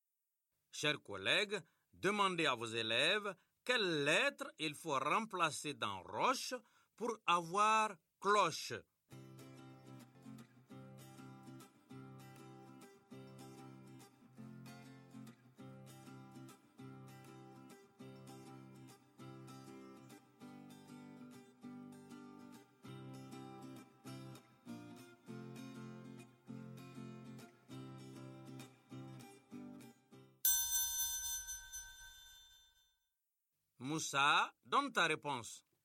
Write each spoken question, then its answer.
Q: Chers collègues, demandez à vos élèves quelles lettres il faut remplacer dans roche pour avoir cloche.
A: J'efface la lettre R. Et j'écris CL.